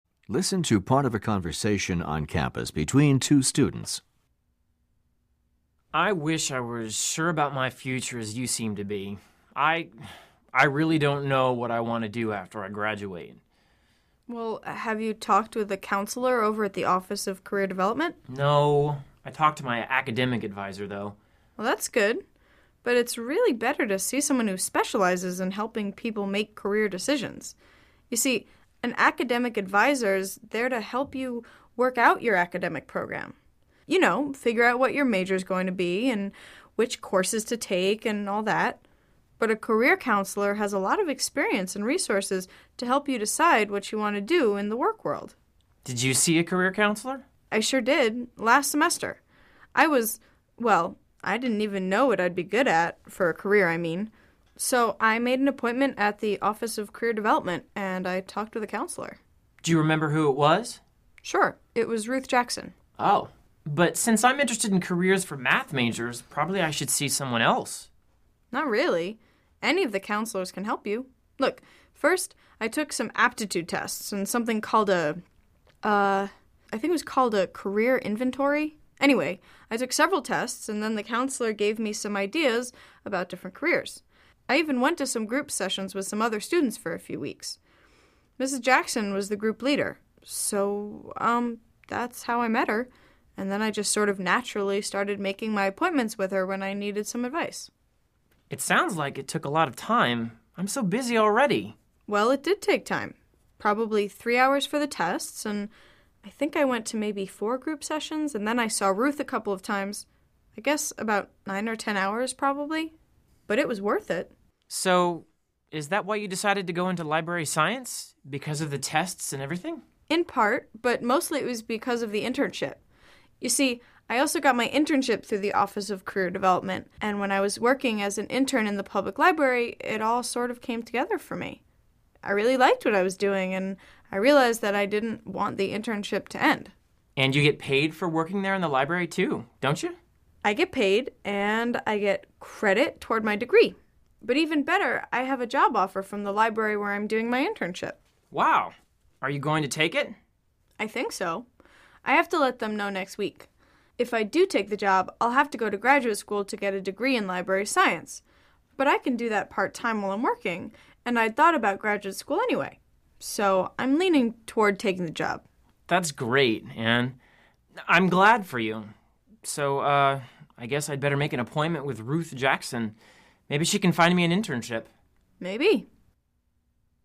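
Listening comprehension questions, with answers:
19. What is the man's problem?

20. Why does the woman tell the man about her experience?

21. What is the woman's attitude toward her internship?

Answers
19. He doesn't know what he wants to do after he graduates.
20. To encourage him to see a career counselor.
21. She is very positive about it.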